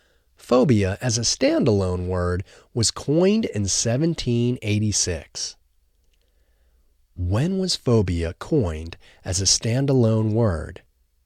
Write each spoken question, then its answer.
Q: When was phobia coined as a standalone word?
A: Phobia was coined as a standalone word in 1786.